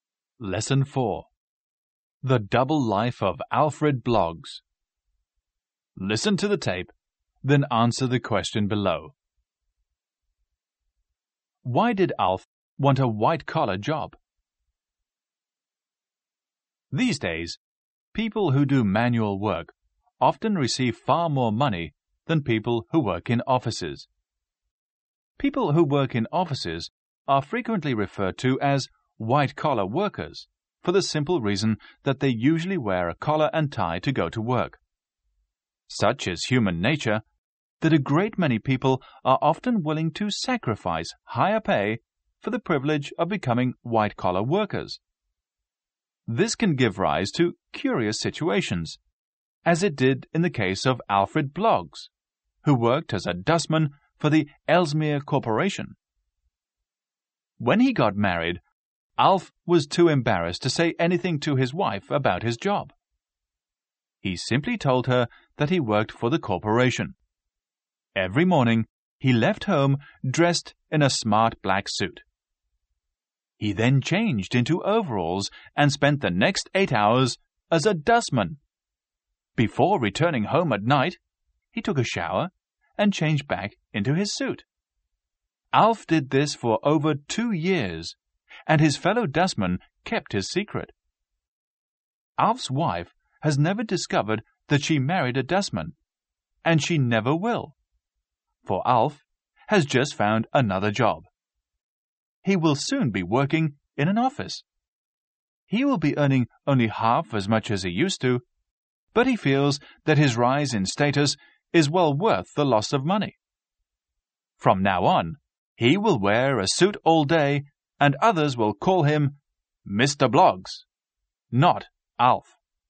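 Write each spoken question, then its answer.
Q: Why did Alf want a white-collar job?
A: He felt the rise in status was worth the loss of money (he was embarrassed to be a dustman).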